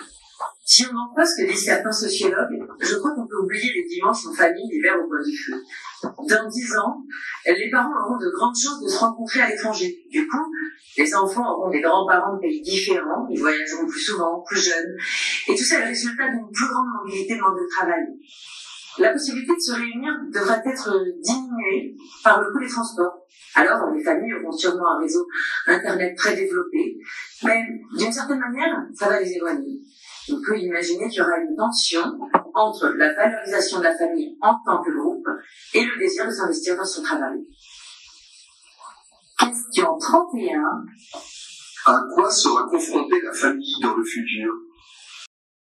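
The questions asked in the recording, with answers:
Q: À quoi sera confrontée la famille dans le futur ?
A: À une tension entre la valorisation de la famille en tant que groupe et le désir de s'investir dans son travail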